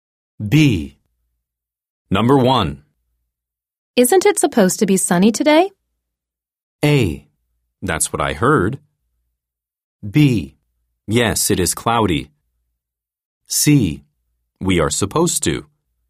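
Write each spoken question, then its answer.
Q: Isn't it supposed to be sunny today?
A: A: That's what I heard.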